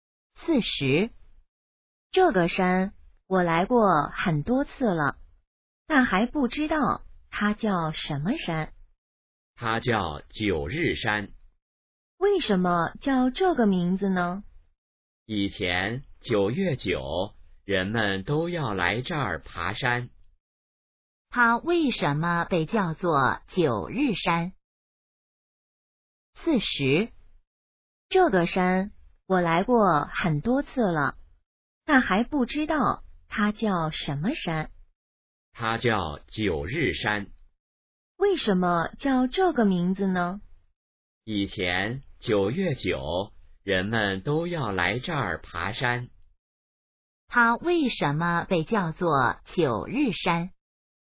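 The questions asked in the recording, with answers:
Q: 它为什么被叫做九日山?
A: 以前9月9日人们都来这儿爬山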